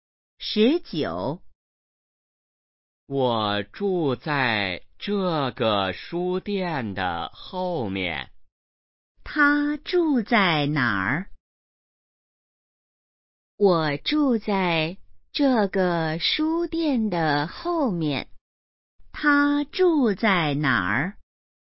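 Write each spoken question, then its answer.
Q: 他住在哪儿?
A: 书店的后面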